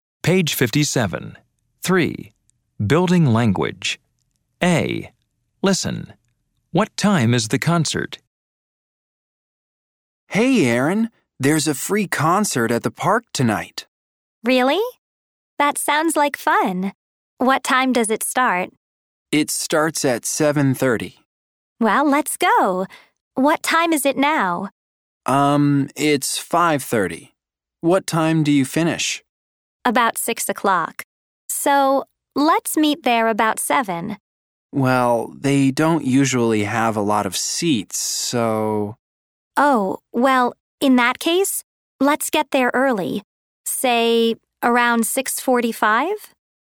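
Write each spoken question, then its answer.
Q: What time is the concert?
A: 7:30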